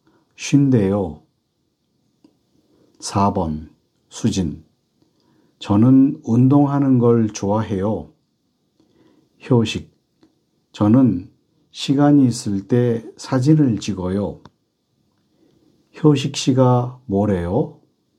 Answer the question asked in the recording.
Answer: 시간이 있을 때 사진을 찍는다고 해요. 찍는데요.